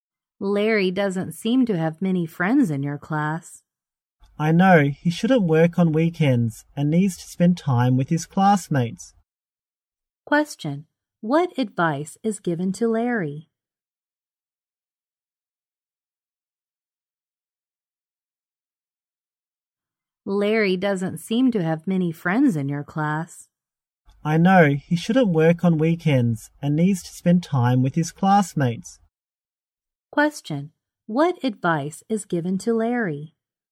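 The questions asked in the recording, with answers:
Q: Question, what advice is given to Larry?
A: He shouldn't work on weekends and should spend time with his classmates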